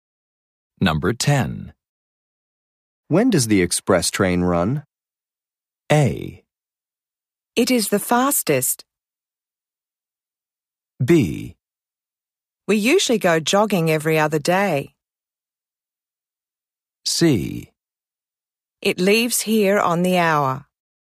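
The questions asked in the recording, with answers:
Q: When does the express train run?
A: C: It leaves here on the hour.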